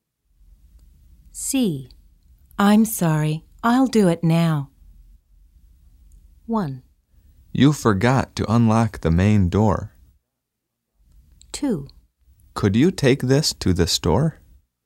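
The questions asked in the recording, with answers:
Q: I'm sorry, I'll do it now.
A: 1: You forgot to unlock the main door.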